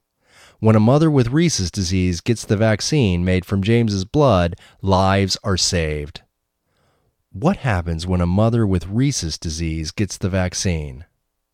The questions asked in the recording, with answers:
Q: What happens when a mother with rhesus disease gets the vaccine?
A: When a mother with rhesus disease gets the vaccine, lives are saved.